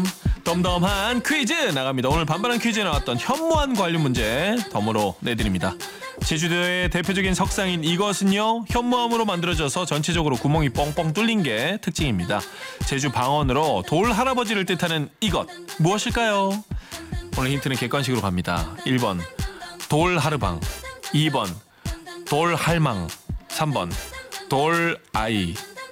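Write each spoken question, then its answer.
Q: 제주 방언으로 돌 할아버지를 뜻하는 이것 무엇일까요?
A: 1: 돌 하르방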